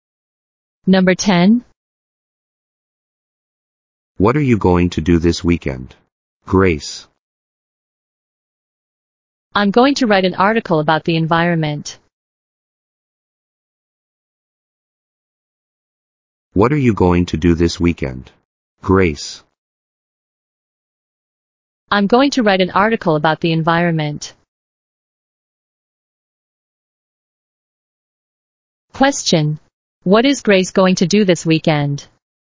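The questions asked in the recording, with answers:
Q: What is Grace going to do this weekend?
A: Write an article about the environment.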